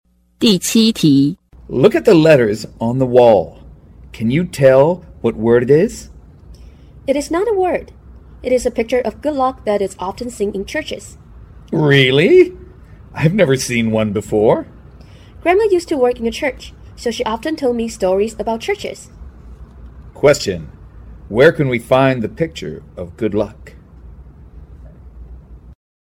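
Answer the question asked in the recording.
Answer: In churches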